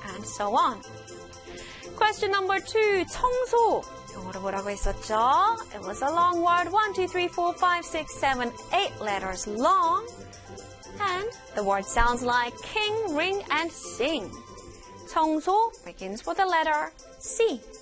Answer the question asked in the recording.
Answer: Cleaning. Cleaning.